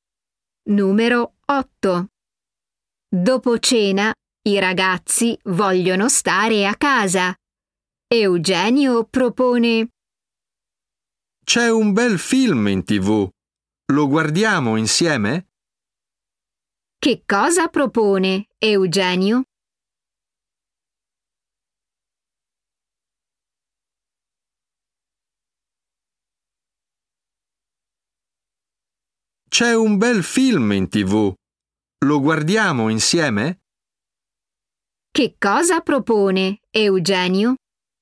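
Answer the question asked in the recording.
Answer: guardare insieme un film in TV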